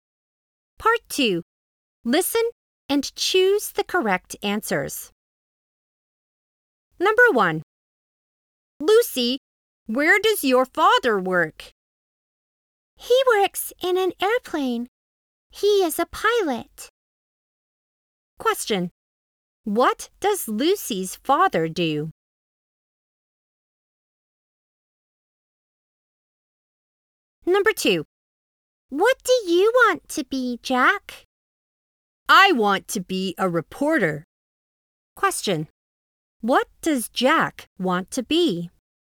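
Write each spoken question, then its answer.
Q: What does Lucy's father do?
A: He is a pilot.

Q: What does Jack want to be?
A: A reporter.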